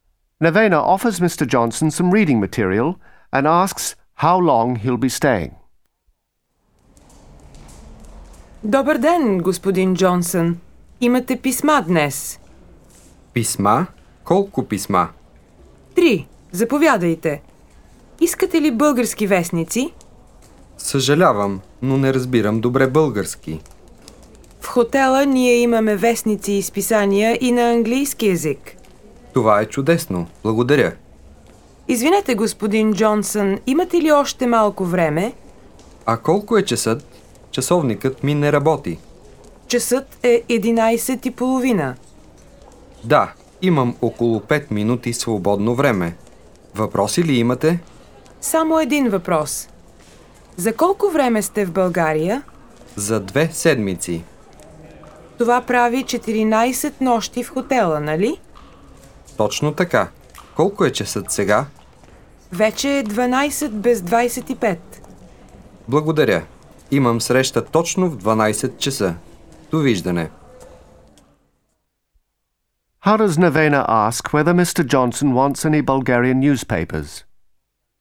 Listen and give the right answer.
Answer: Искате ли български вестници?